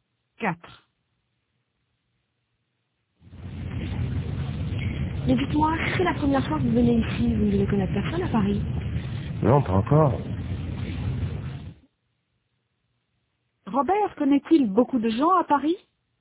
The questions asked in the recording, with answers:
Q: Robert connaît-il beaucoup de gens à Paris?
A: Non, pas encore.